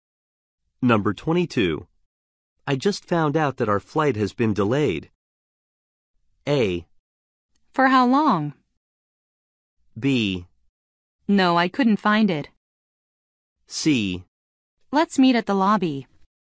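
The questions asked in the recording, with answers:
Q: I just found out that our flight has been delayed.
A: A: For how long?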